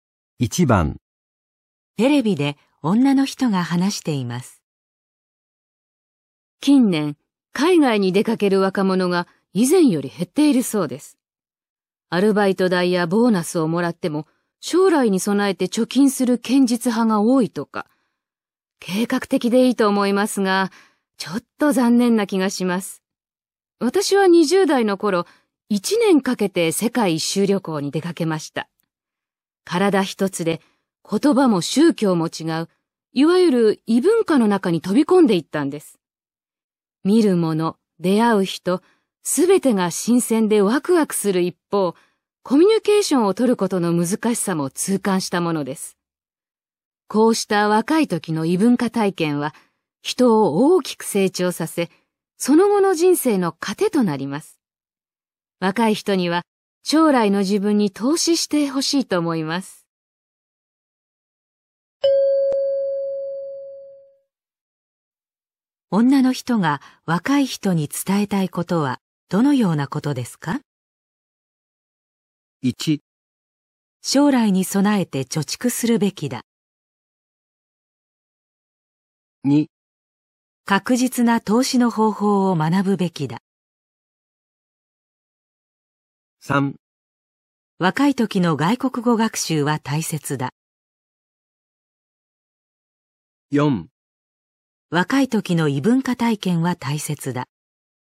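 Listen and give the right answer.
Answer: 4: 若い時の異文化体験は大切だ。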